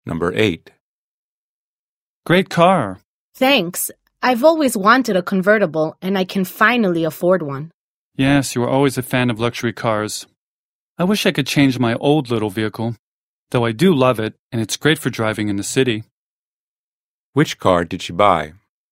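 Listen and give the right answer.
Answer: A convertible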